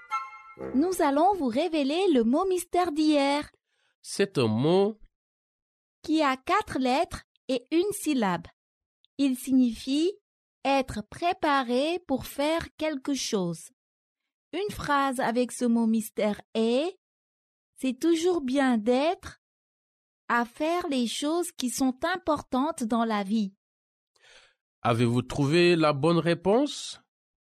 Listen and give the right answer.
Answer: Le mot mystère d'aujourd'hui est « prêt ».